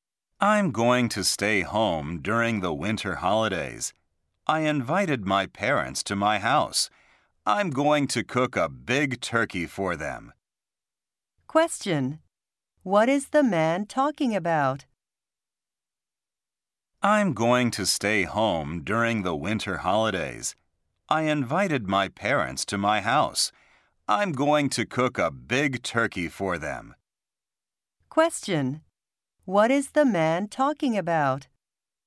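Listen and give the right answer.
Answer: His plans for the winter holidays.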